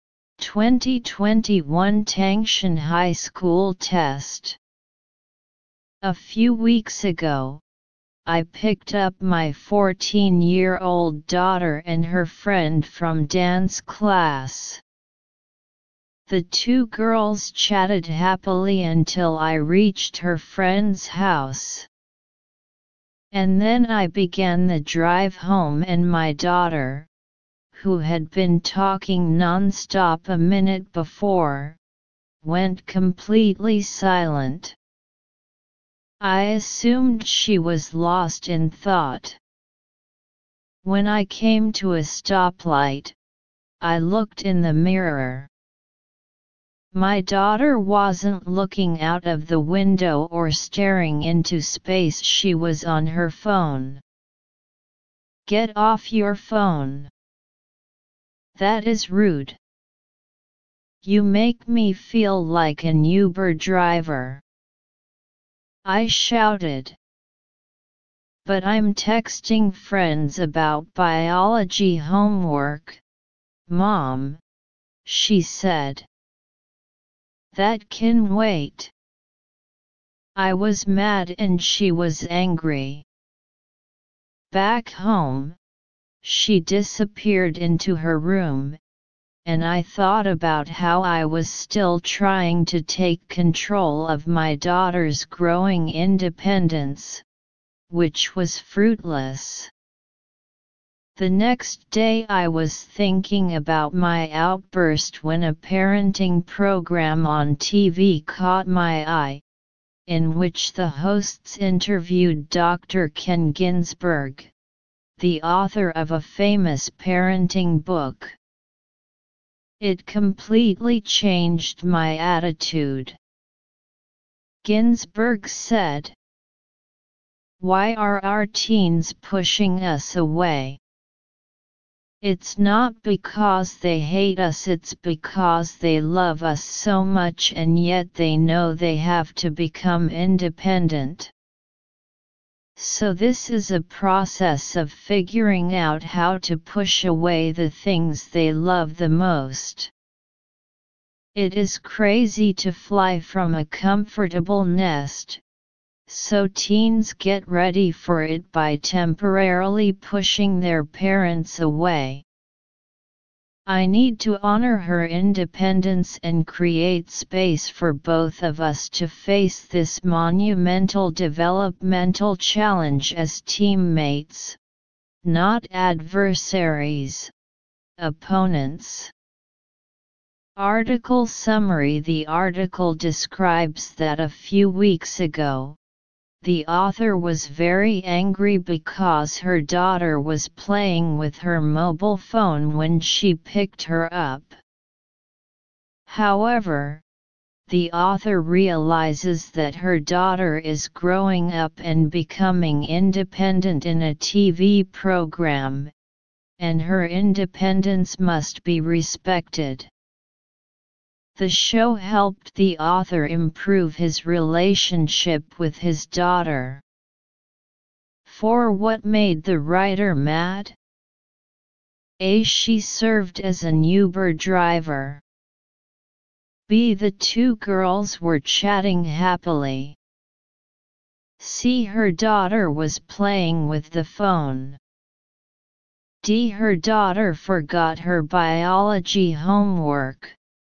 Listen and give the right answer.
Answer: Choose C.